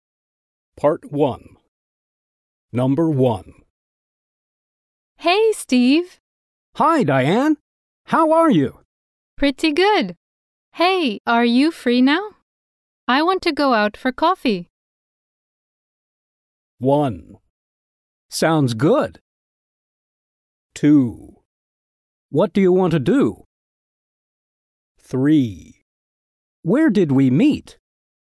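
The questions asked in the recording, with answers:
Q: I want to go out for coffee.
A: 1: Sounds good.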